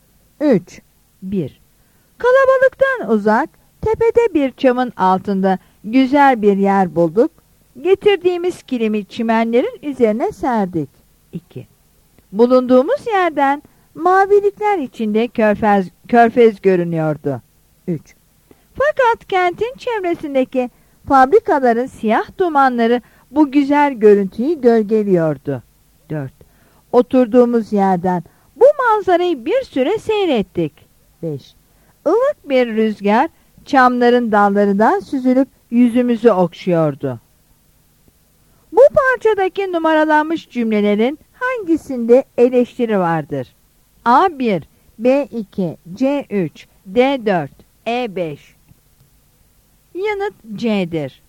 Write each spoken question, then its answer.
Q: Bu parçadaki numaralanmış cümlelerin hangisinde eleştiri vardır?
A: Yanıt C'dir.